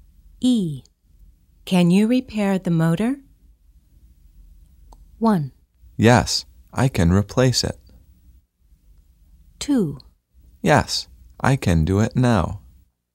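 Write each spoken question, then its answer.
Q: Can you repair the motor?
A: 2: Yes, I can do it now.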